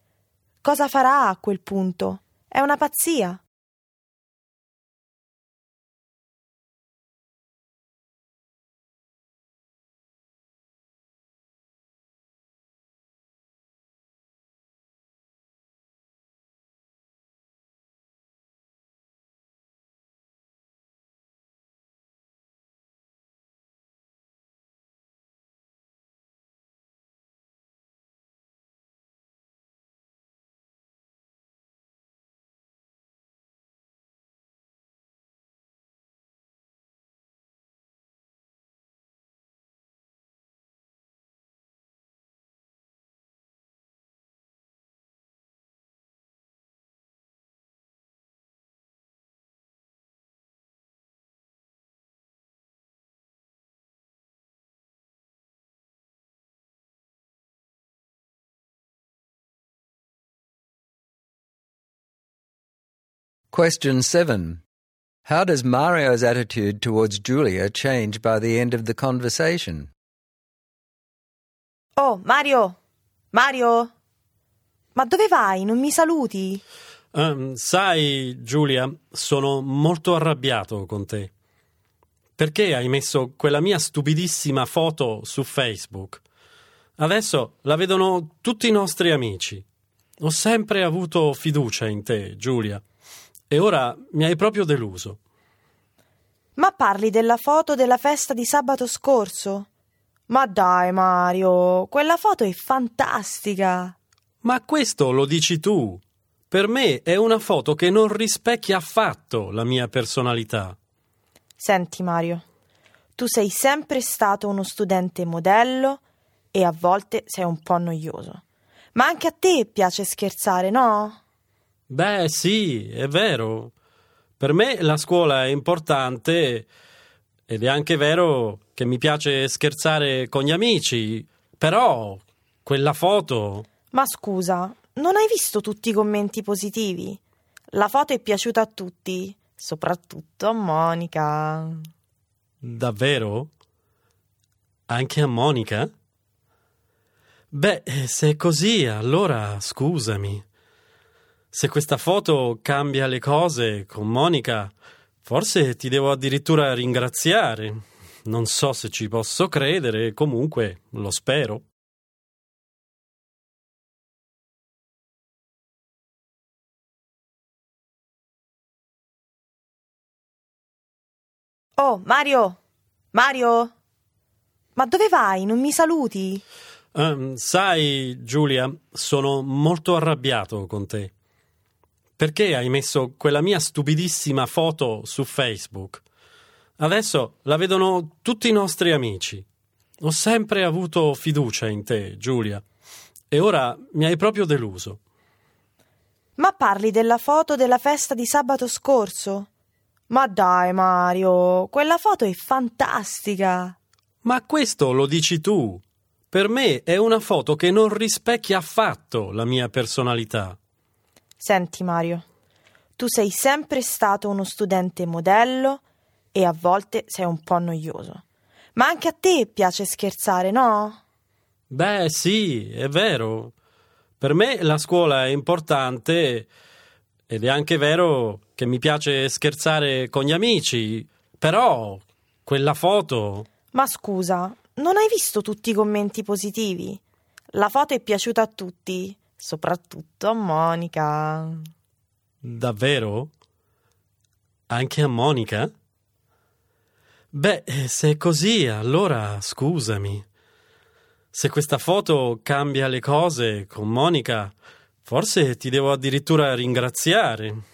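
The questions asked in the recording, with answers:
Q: How does Mario's attitude towards Giulia change by the end of the conversation?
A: He goes from angry and disappointed to apologetic and even grateful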